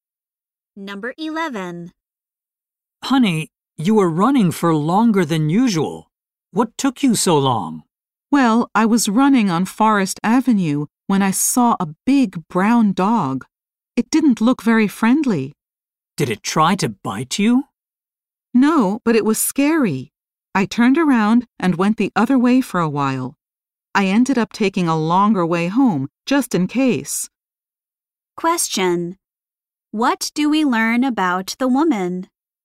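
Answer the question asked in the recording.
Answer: She took a longer way home because of a scary dog.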